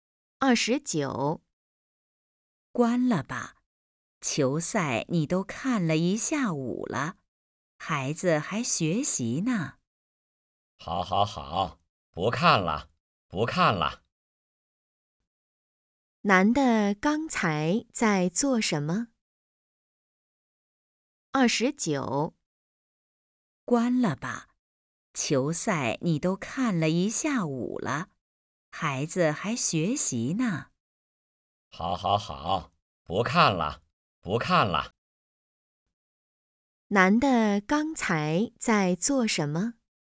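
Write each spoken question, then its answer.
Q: 男的刚才在做什么?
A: 看球赛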